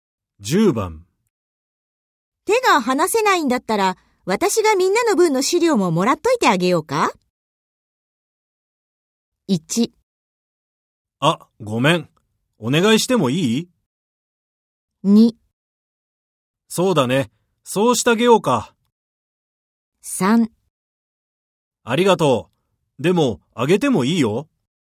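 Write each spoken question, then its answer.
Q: 手が離せないんだったら私がみんなの分の資料ももらっといてあげようか。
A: 1: あ、ごめん。お願いしてもいい?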